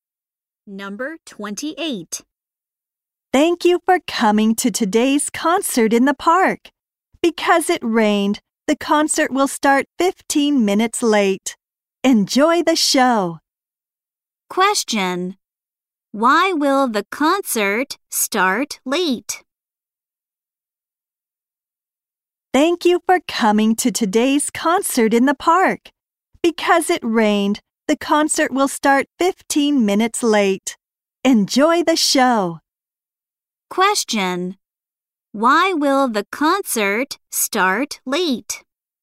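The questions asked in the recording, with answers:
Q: Why will the concert start late?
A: Because it rained.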